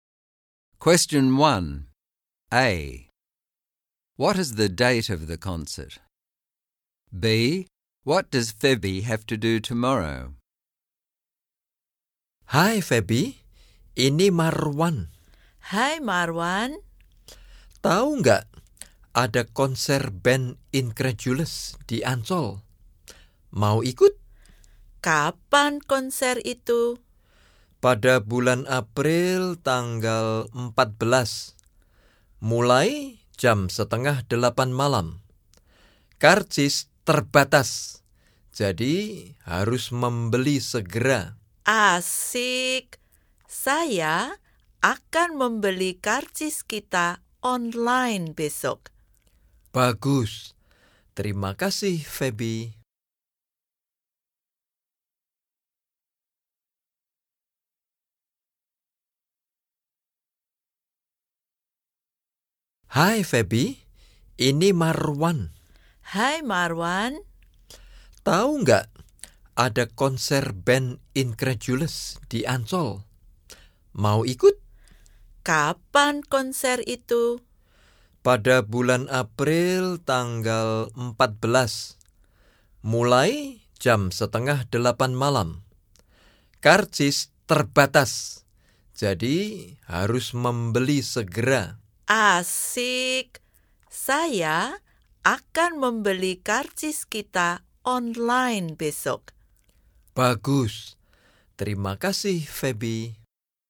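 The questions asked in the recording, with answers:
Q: What is the date of the concert?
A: 14 April

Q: What does Febby have to do tomorrow?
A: Buy their concert tickets online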